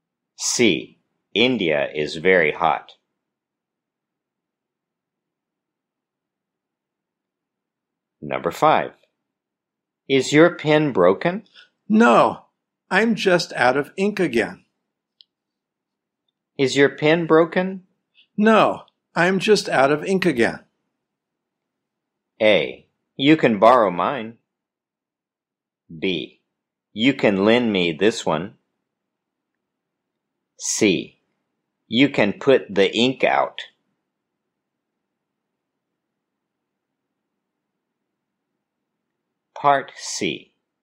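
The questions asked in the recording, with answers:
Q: No, I'm just out of ink again.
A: A: You can borrow mine.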